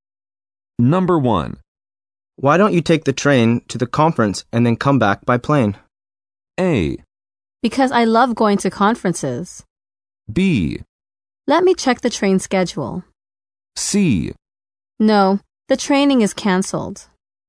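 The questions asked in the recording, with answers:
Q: Why don't you take the train to the conference and then come back by plane?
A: B: Let me check the train schedule.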